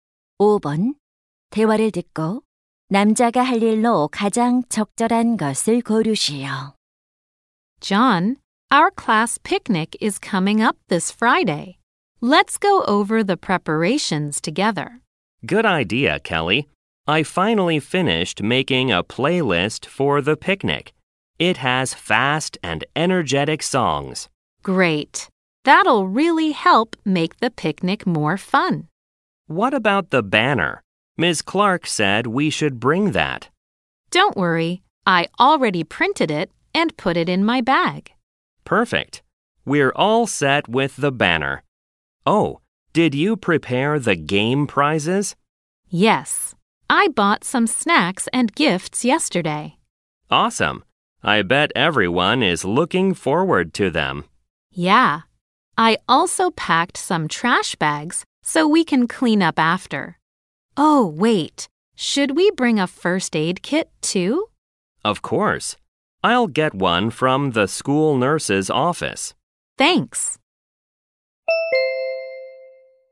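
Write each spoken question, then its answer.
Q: 대화를 듣고 남자가 할 일로 가장 적절한 것을 고르시오.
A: 보건실에서 구급상자 가져오기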